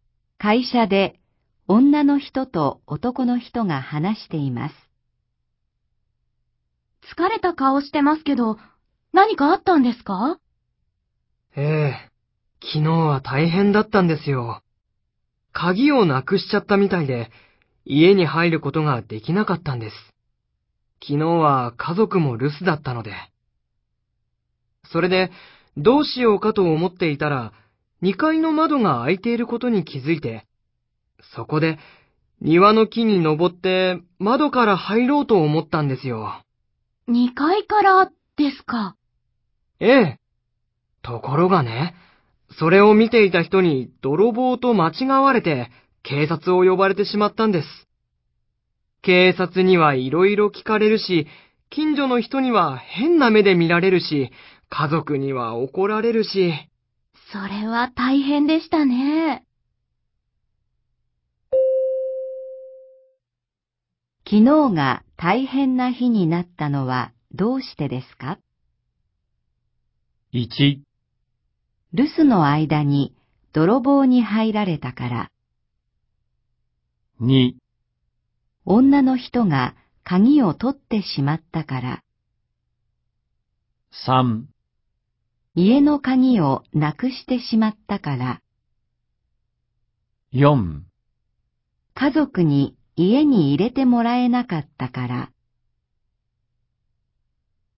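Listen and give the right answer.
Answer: 3: 家の鍵をなくしてしまったから。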